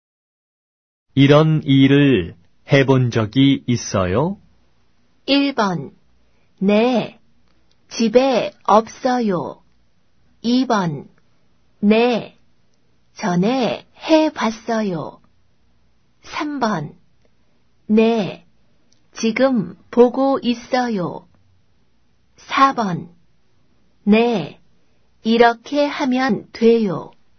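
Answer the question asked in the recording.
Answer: 2: 네. 전에 해봤어요.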